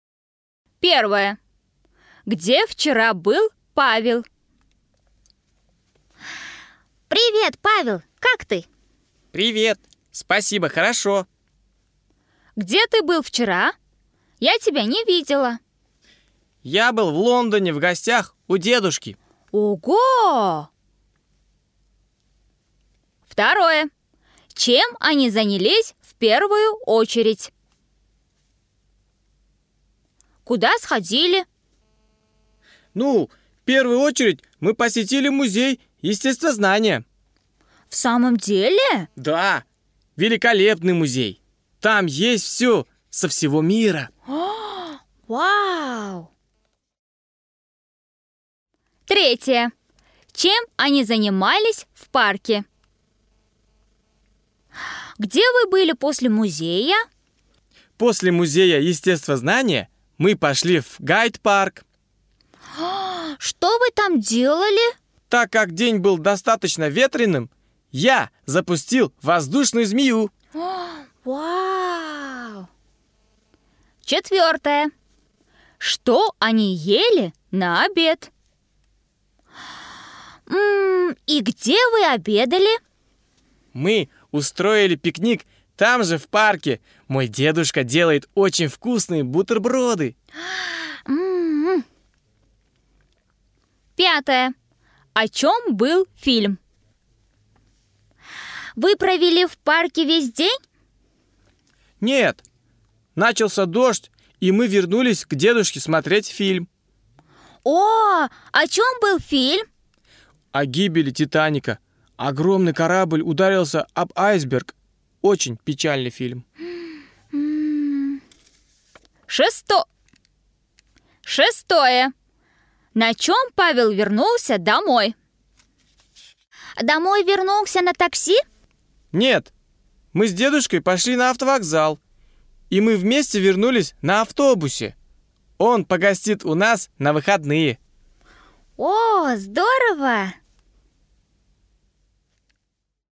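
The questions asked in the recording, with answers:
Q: Где вчера был Павел?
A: В Лондоне, в гостях у дедушки

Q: Чем они занялись в первую очередь?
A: Посетили музей естествознания

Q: Чем они занимались в парке?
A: Запускали воздушного змея

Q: Что они ели на обед?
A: Бутерброды (пикник)

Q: О чем был фильм?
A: О гибели Титаника

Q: На чем Павел вернулся домой?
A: На автобусе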